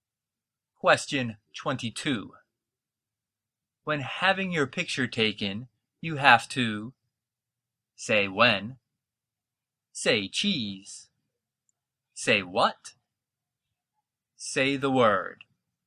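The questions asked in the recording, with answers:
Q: When having your picture taken, you have to say when, say cheese, say what, say the word.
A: B: say cheese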